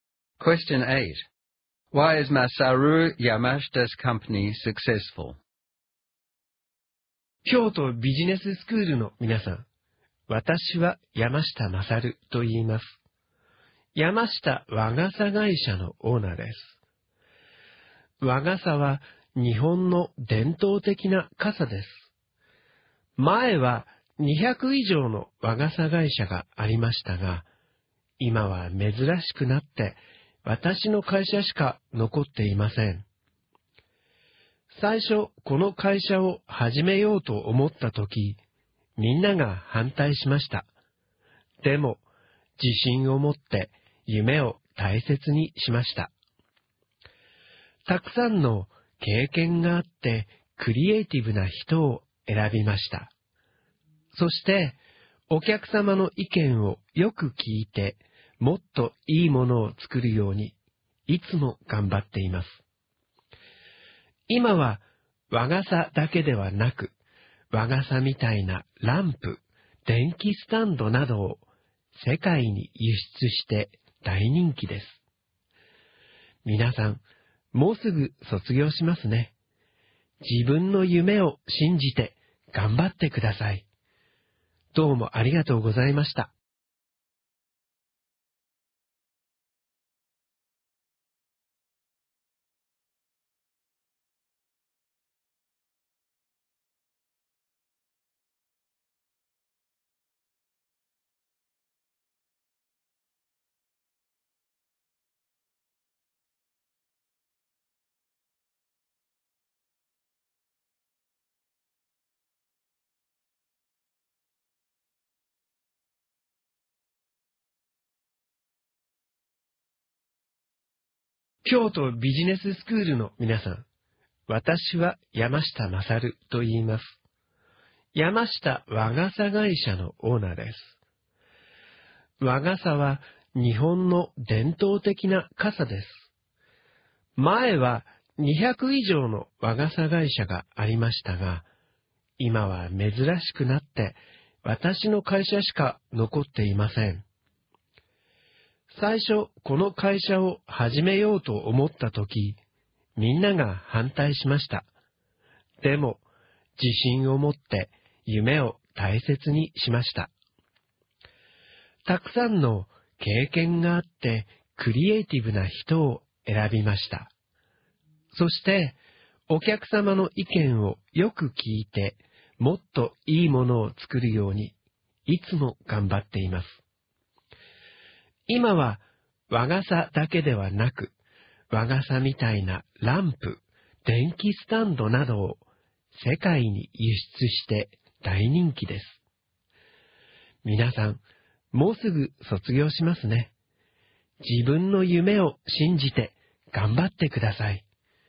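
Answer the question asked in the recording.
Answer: He believed in his dream, hired experienced, creative people, listens to customers to make better products, and exports umbrella-style lamps and stands worldwide.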